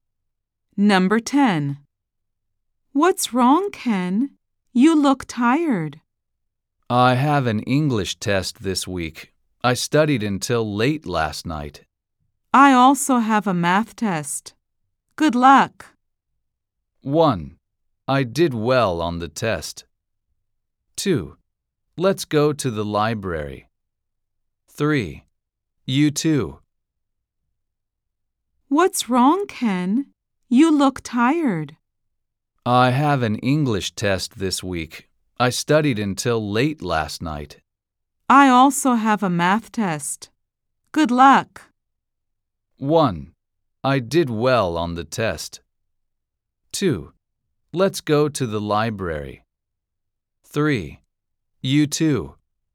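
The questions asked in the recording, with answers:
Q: I also have a math test. Good luck.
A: 3: You too.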